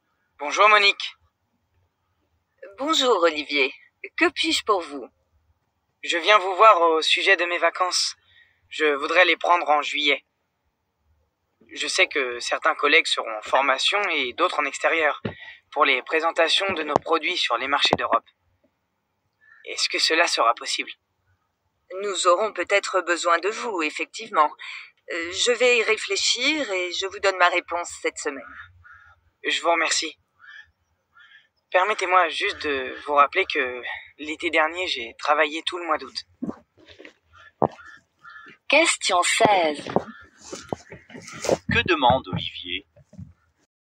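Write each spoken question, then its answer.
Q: Que demande Olivier ?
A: Prendre ses vacances en juillet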